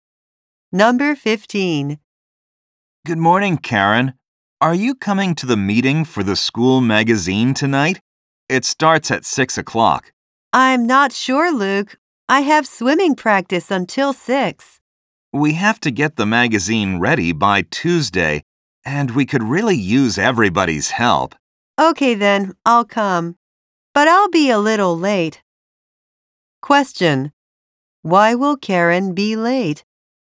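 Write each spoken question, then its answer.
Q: Why will Karen be late?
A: She has swimming practice until 6.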